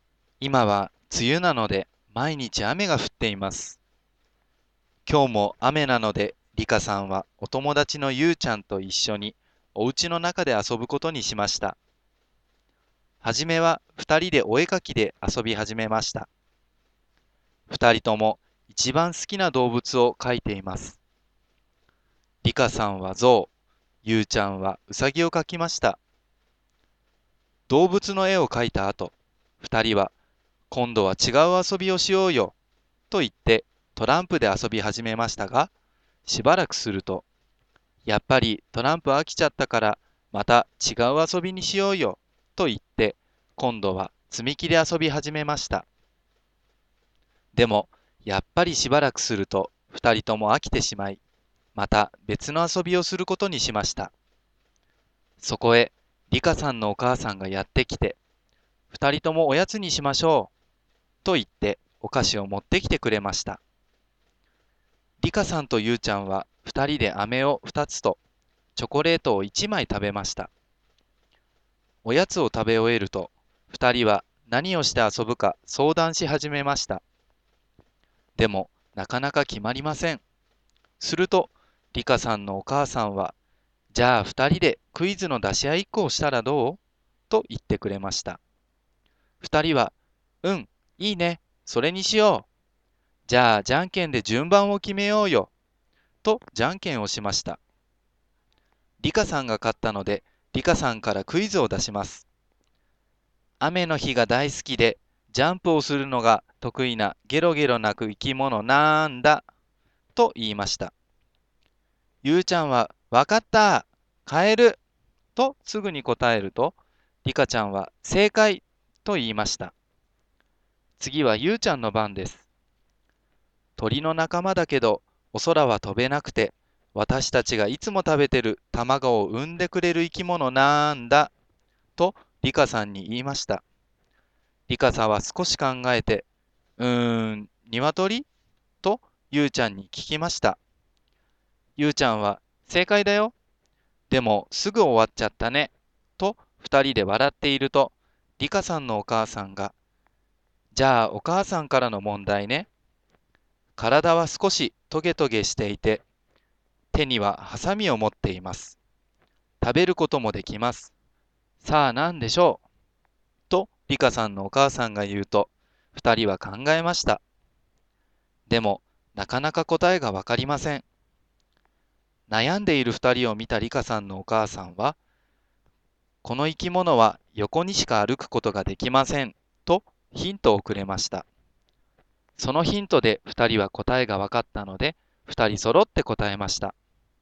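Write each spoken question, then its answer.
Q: さあ何でしょう?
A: カニ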